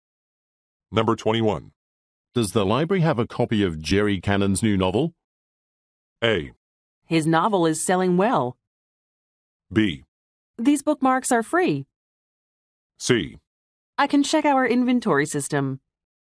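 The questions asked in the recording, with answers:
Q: Does the library have a copy of Jerry Cannon's new novel?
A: C: I can check our inventory system.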